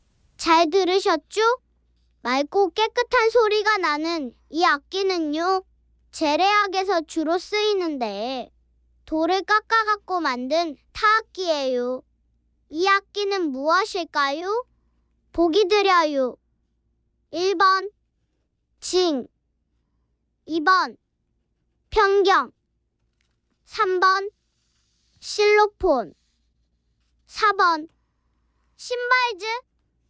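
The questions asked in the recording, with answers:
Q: 이 악기는 무엇일까요?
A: 2: 편경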